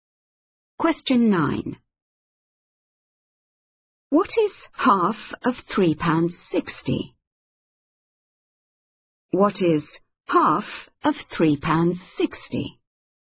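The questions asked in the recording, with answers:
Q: What is half of £3.60?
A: £1.80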